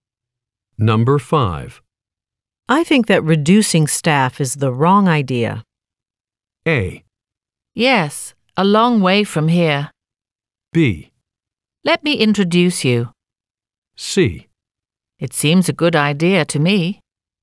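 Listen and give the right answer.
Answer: C: It seems a good idea to me.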